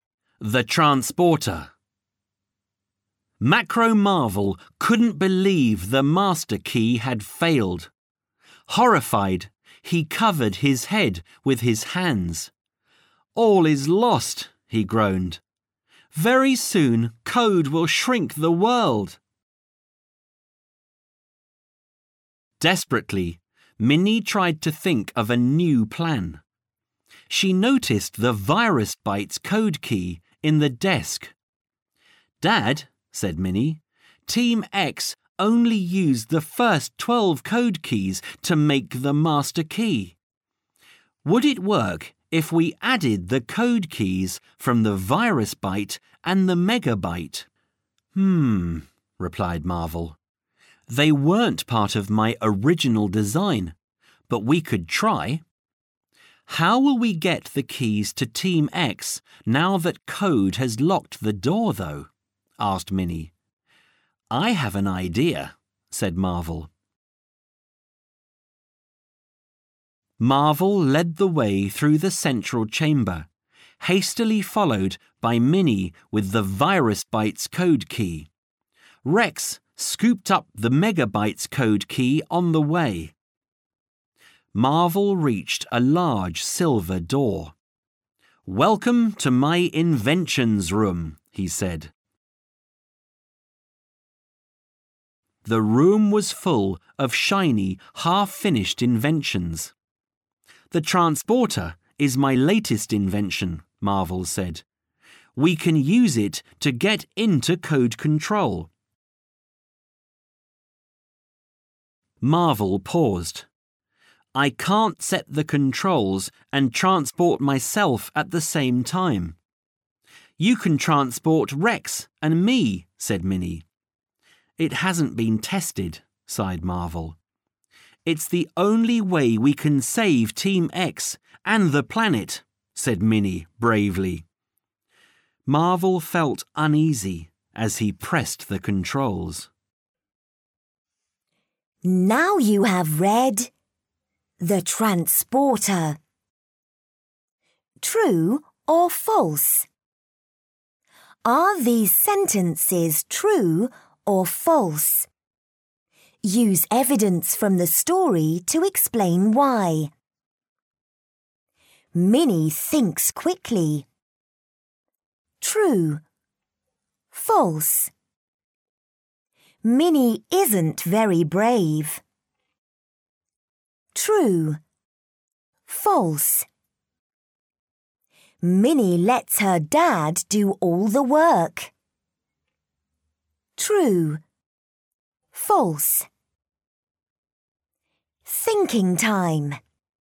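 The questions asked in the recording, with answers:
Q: Minnie thinks quickly.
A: True

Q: False. Minnie isn't very brave.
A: False

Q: Minnie lets her dad do all the work.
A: False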